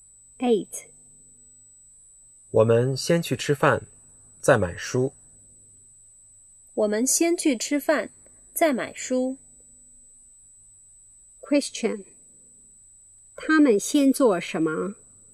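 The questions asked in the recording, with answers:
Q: 他们先做什么?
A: 吃饭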